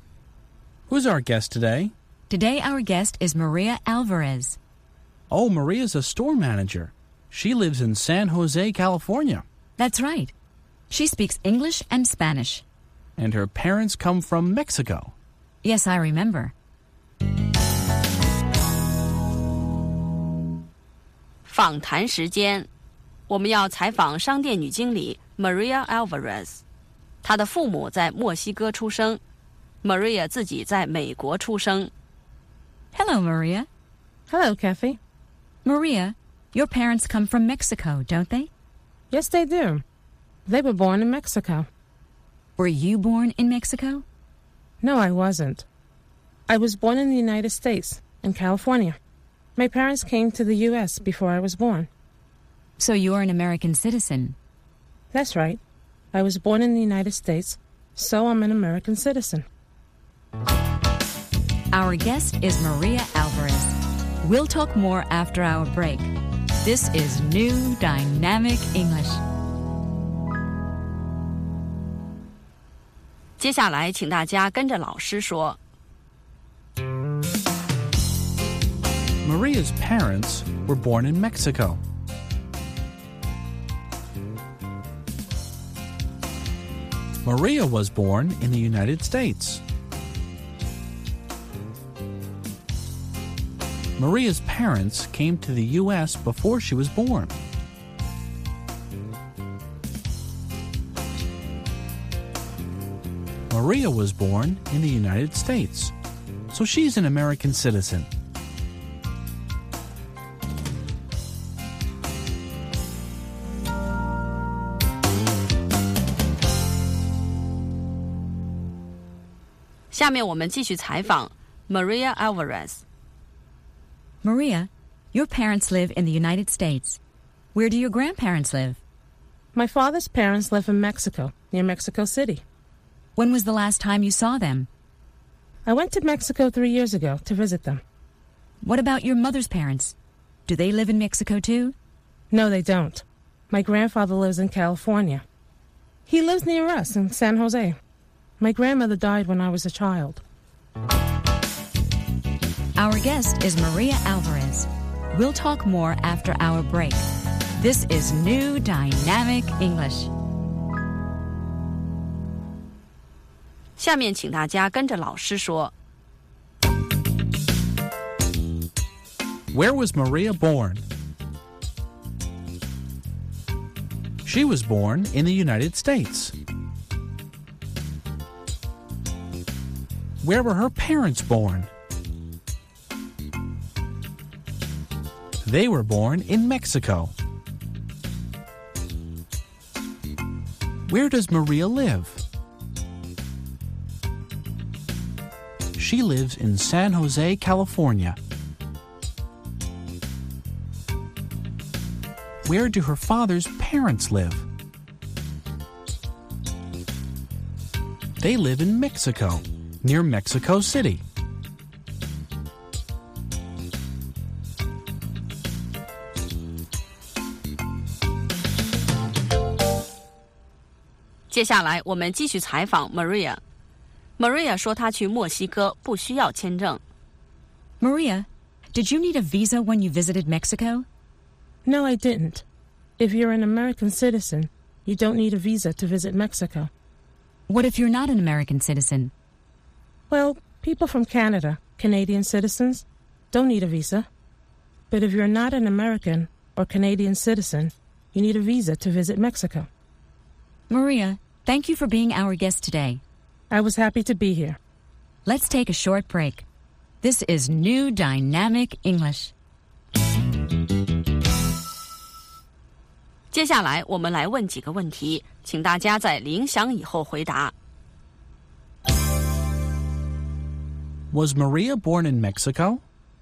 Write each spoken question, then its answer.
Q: Was Maria born in Mexico?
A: No, she wasn't. She was born in the United States.